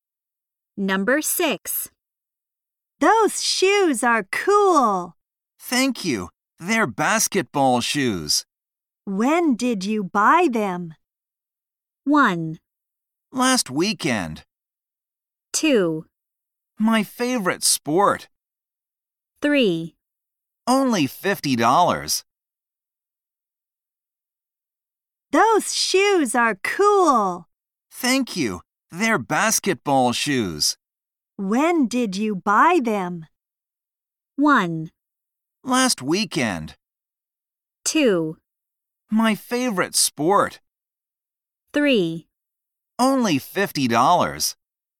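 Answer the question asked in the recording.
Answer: 1: Last weekend.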